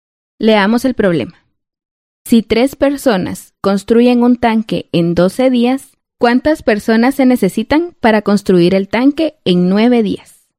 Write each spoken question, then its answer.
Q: ¿cuántas personas se necesitan para construir el tanque en 9 días?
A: nuestra respuesta es que se necesitan 4 personas.